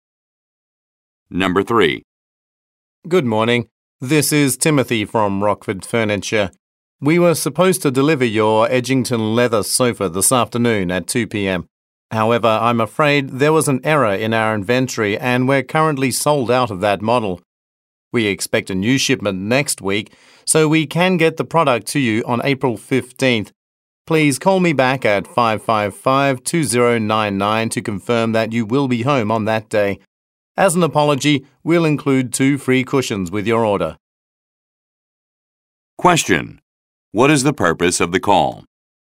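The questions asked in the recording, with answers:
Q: What is the purpose of the call?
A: To tell the customer the sofa delivery is delayed because the model is sold out, and to reschedule it for April 15th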